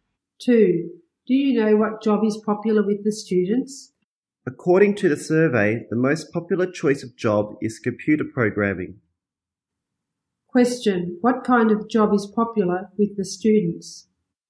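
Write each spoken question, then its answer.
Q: What kind of job is popular with the students?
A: Computer programming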